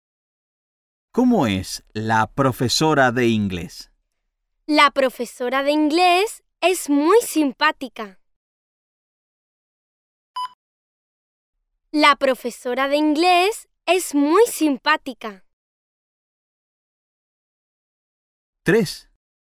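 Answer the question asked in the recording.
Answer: muy simpática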